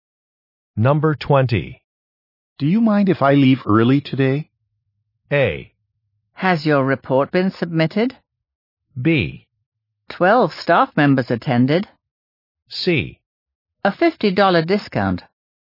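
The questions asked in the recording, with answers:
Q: Do you mind if I leave early today?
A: A: Has your report been submitted?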